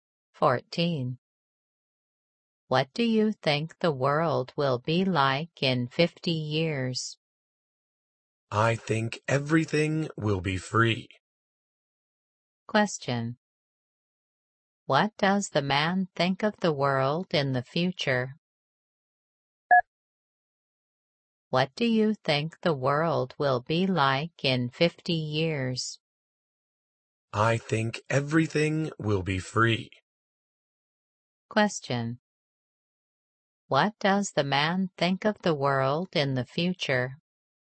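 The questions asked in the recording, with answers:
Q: What does the man think of the world in the future?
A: Everything will be free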